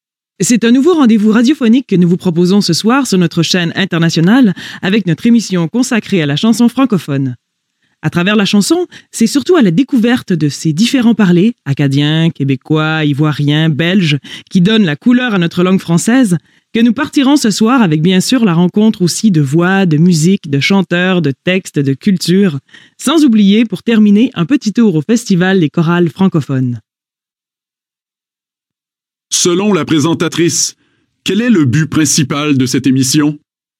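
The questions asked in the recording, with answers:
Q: Selon la présentatrice, quel est le but principal de cette émission?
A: Faire découvrir, à travers la chanson, les différents parlers francophones (acadien, québécois, ivoirien, belge)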